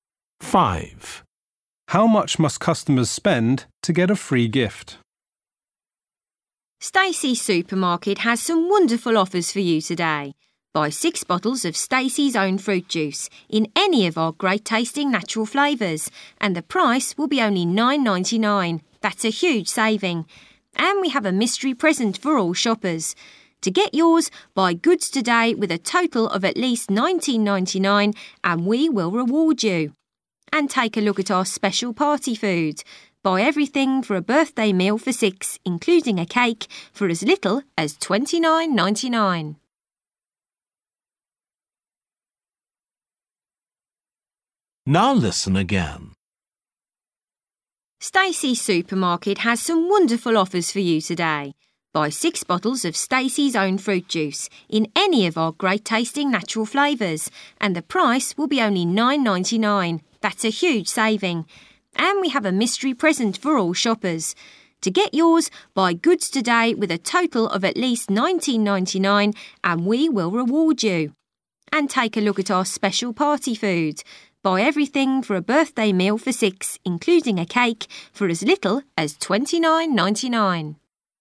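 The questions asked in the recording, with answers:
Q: How much must customers spend to get a free gift?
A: $19.99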